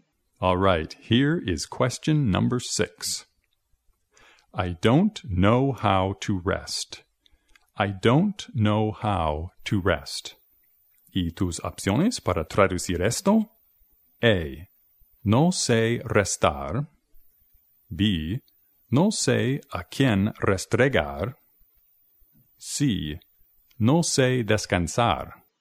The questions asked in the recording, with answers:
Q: I don't know how to rest.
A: Las respuestas son chistosas, pero la correcta es C.